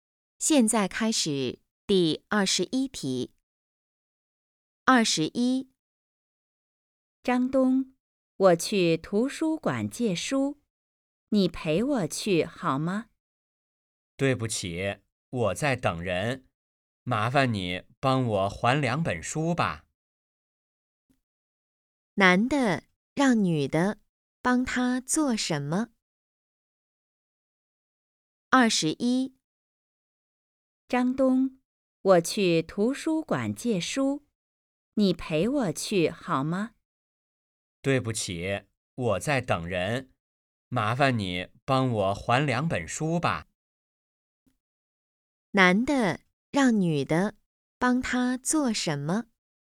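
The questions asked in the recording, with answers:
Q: 男的让女的帮他做什么?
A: 还书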